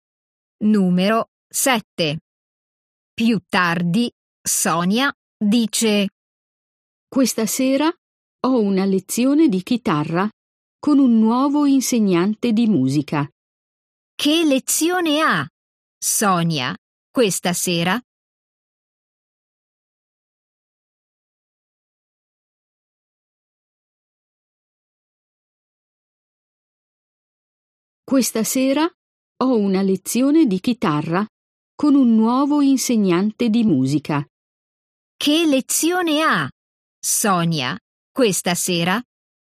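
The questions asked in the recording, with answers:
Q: Che lezione ha, Sonia, questa sera?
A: una lezione di chitarra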